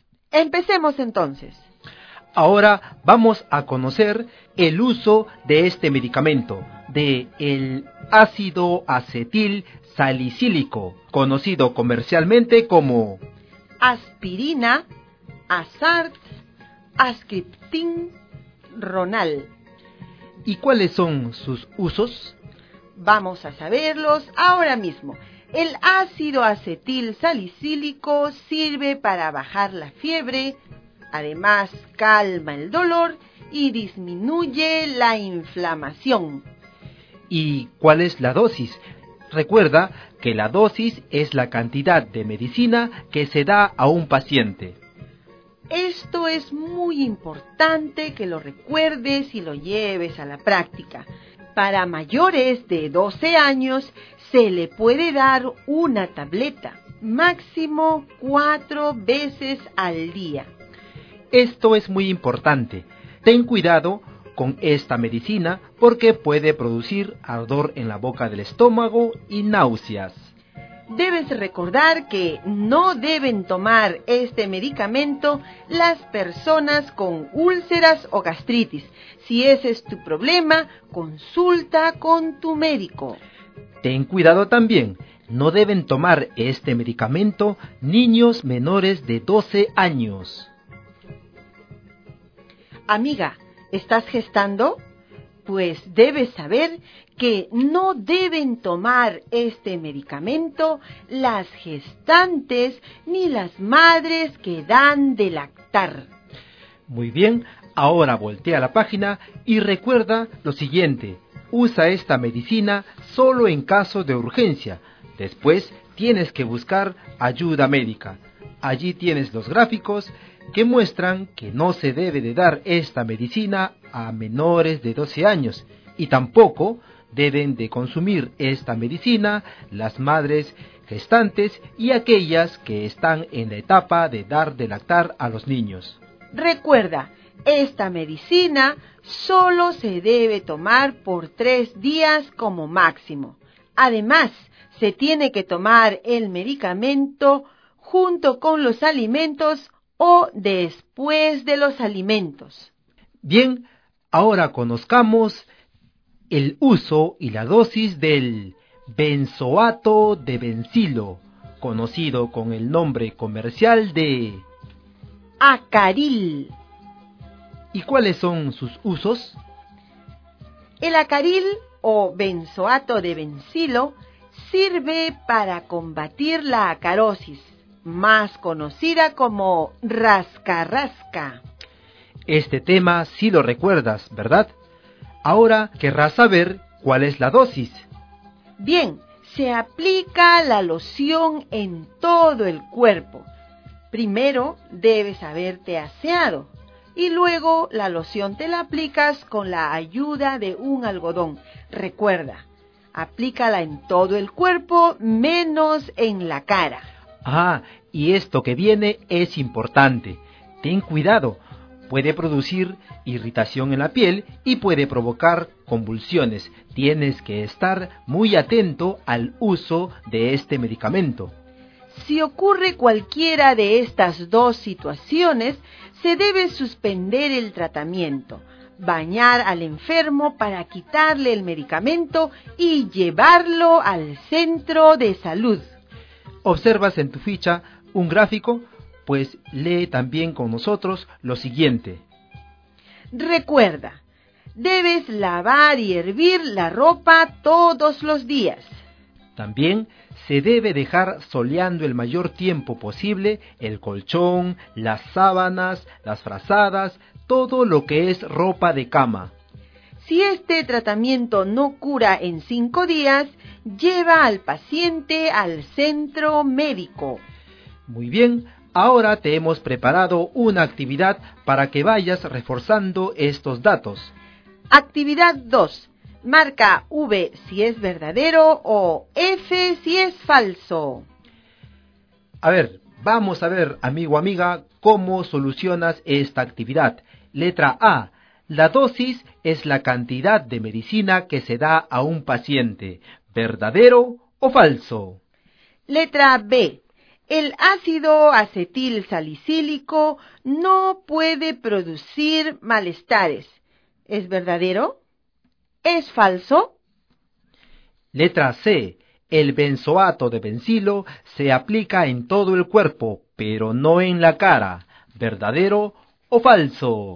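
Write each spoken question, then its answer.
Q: Letra A. La dosis es la cantidad de medicina que se da a un paciente.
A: Verdadero

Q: Letra B. El ácido acetil salicílico no puede producir malestares.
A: Falso

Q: Letra C. El benzoato de benzilo se aplica en todo el cuerpo, pero no en la cara.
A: Verdadero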